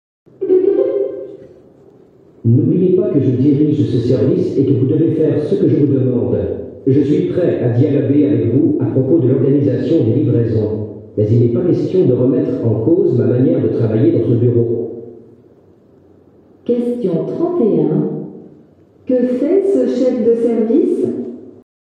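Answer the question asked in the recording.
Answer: Il rappelle son autorité et refuse qu'on remette en cause sa manière de travailler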